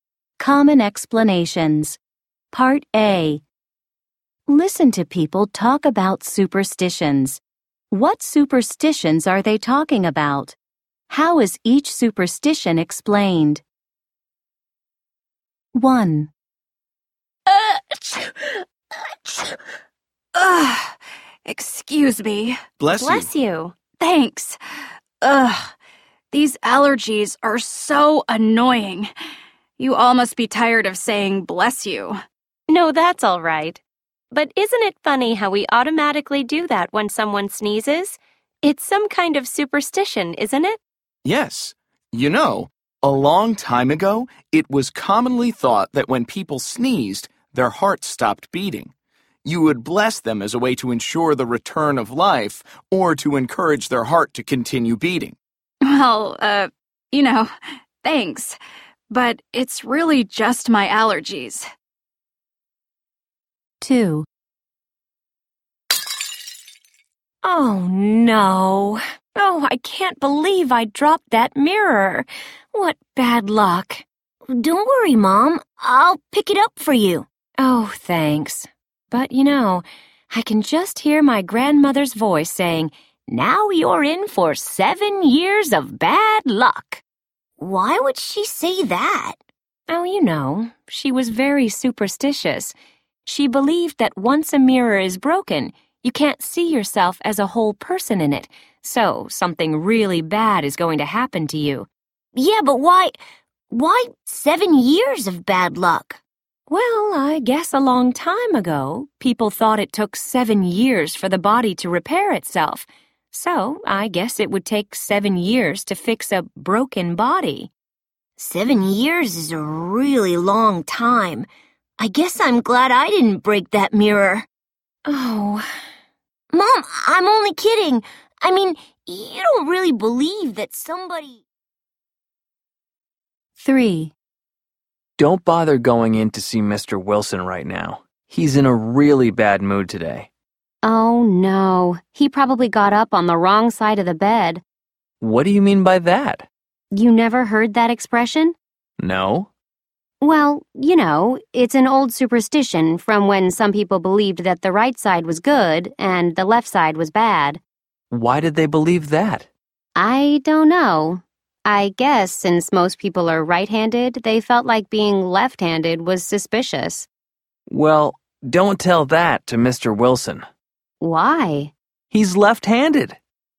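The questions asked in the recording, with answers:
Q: What superstitions are they talking about?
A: Saying 'bless you' when someone sneezes; breaking a mirror brings 7 years of bad luck; getting up on the wrong side of the bed

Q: How is each superstition explained?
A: People thought the heart stopped when sneezing; the body was thought to take 7 years to repair itself; the right side was considered good and the left side bad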